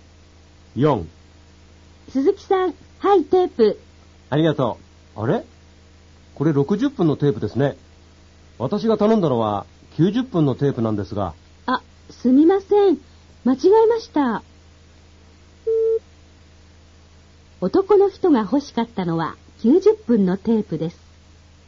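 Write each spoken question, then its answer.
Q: 男の人が欲しかったのは90分のテープです。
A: 正しい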